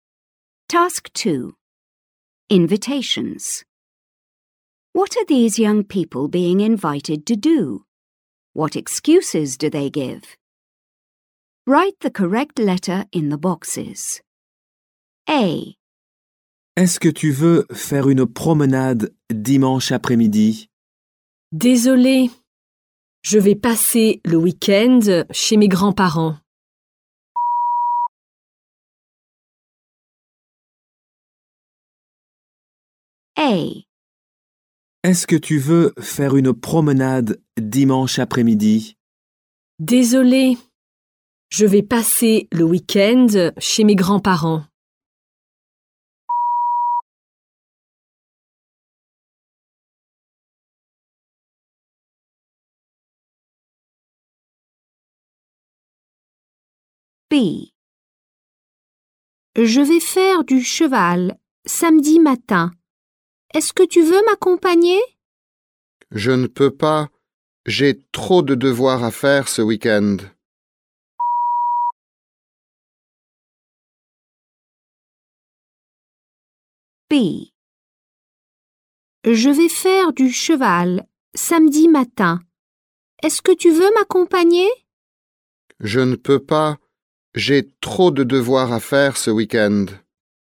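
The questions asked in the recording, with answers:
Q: What are these young people being invited to do?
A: A: go for a walk on Sunday afternoon; B: go horse riding on Saturday morning

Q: What excuses do they give?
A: A: spending the weekend at grandparents'; B: too much homework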